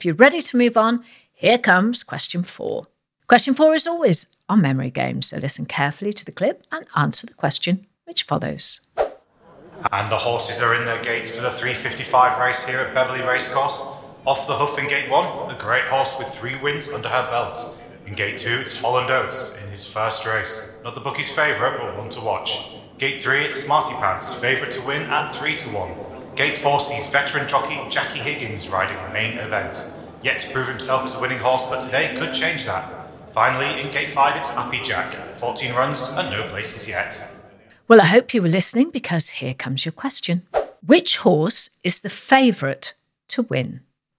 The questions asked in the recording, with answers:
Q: Which horse is the favourite to win?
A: And the answer was Smarty Pants.